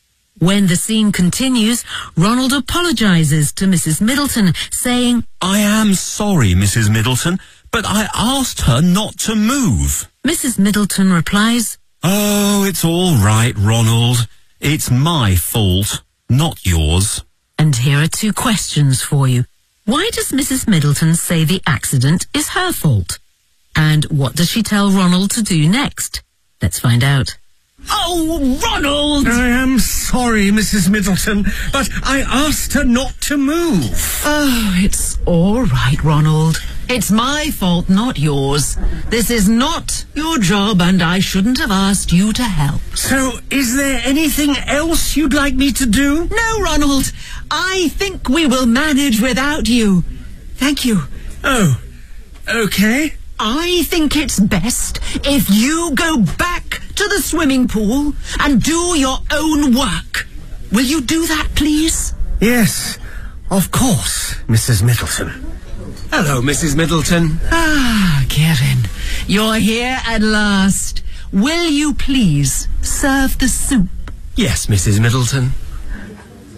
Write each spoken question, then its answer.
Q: Why does Mrs. Middleton say the accident is her fault?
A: This is not your job, and I shouldn't have asked you to help.

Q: And what does she tell Ronald to do next?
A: I think it's best if you go back to the swimming pool and do your own work.